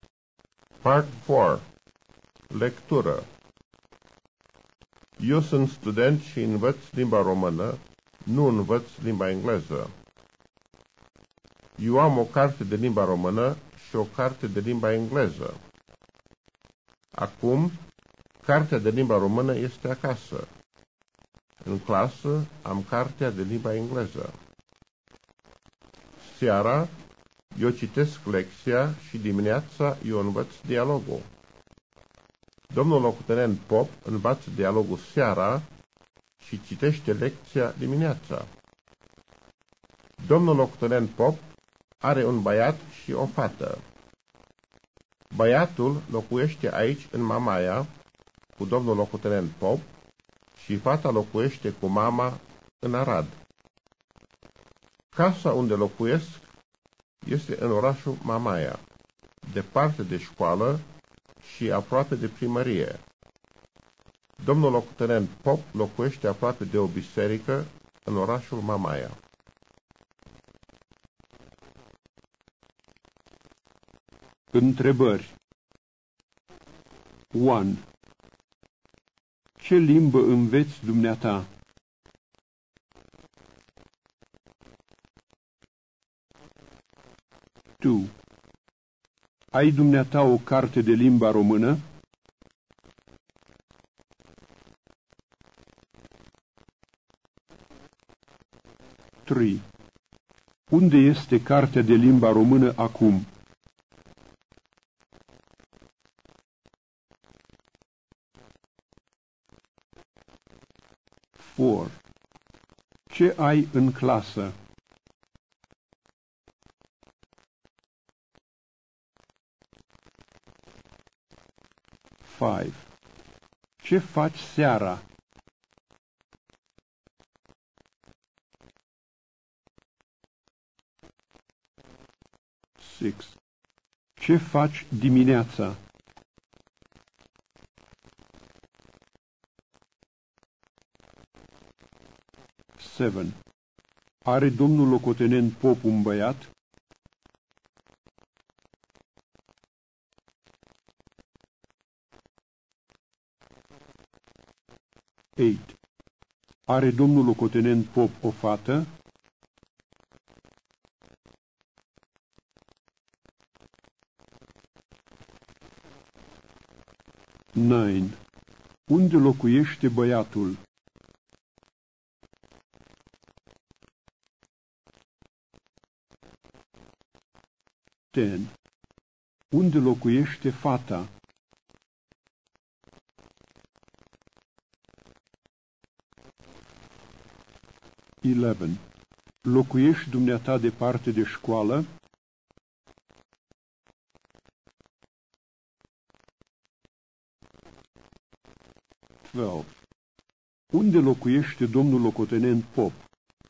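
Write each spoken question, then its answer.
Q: Ce limbă înveți dumneata?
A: Limba română.

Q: Ai dumneata o carte de limba română?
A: Da.

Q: Unde este cartea de limba română acum?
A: Acasă.

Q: Ce ai în clasă?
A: Cartea de limba engleză.

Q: Ce faci seara?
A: Citesc lecția.

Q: Ce faci dimineața?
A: Învăț dialogul.

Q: Are domnul locotenent Pop un băiat?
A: Da.

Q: Are domnul locotenent Pop o fată?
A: Da.

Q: Unde locuiește băiatul?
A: În Mamaia, cu domnul locotenent Pop.

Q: Unde locuiește fata?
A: Cu mama, în Arad.

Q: Locuiești dumneata departe de școală?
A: Da, departe de școală.

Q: Unde locuiește domnul locotenent Pop?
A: Aproape de o biserică în orașul Mamaia.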